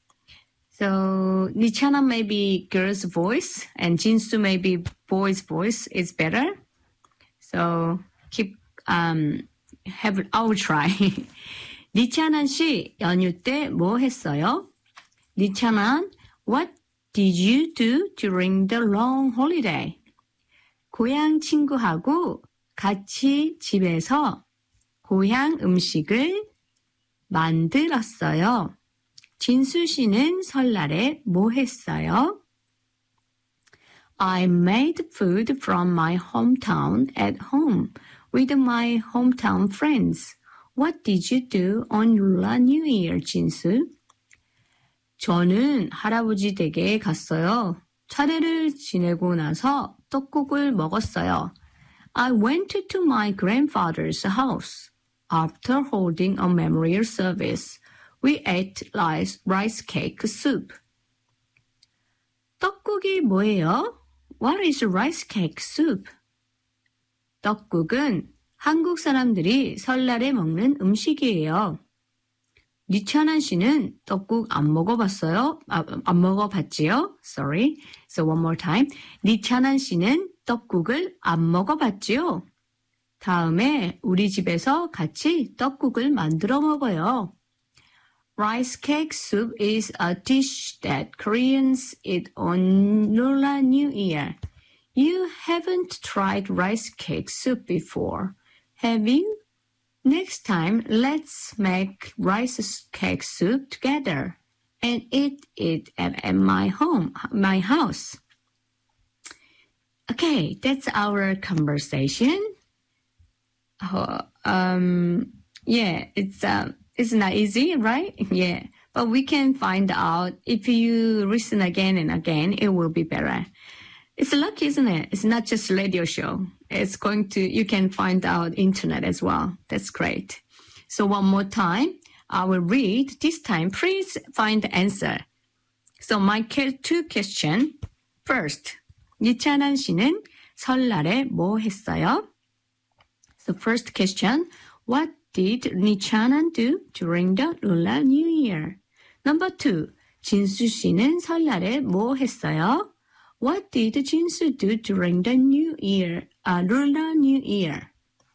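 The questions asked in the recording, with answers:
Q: 이찬한 씨는 설날에 뭐 했어요?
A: 고향 친구하고 같이 집에서 고향 음식을 만들었어요

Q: 진수 씨는 설날에 뭐 했어요?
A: 할아버지 댁에 가서 차례를 지내고 떡국을 먹었어요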